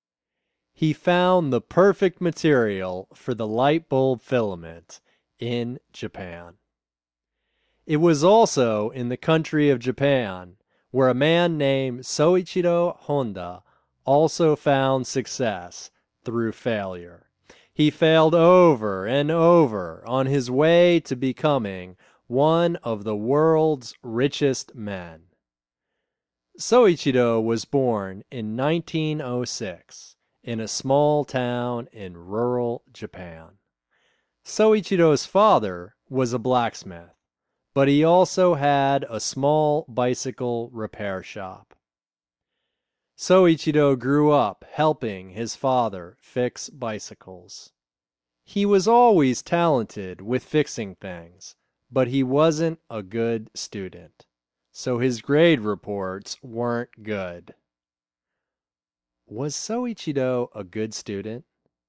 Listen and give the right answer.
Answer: No, he wasn't a good student.